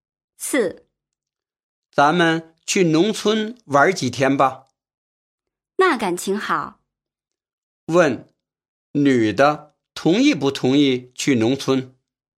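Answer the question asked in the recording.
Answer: 同意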